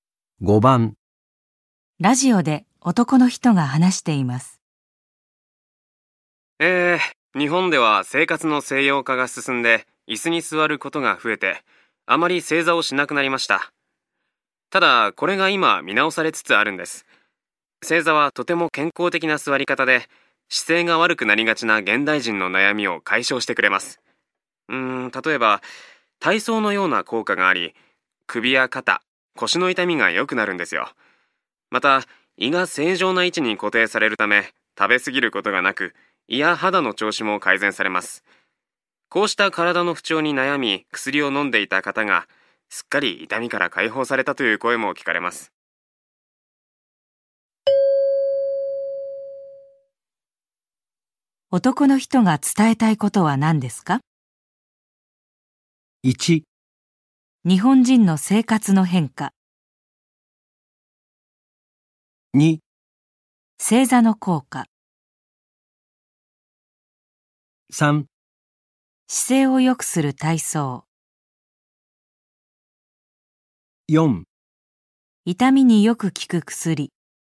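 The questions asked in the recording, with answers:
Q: 男の人が伝えたいことは何ですか?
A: 2: 正座の効果。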